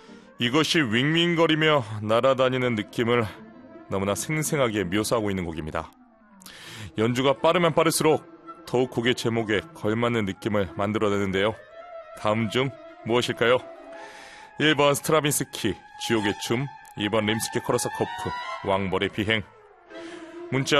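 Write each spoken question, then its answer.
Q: 다음 중 무엇일까요?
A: 2: 림스키 코러스 커프, 왕벌의 비행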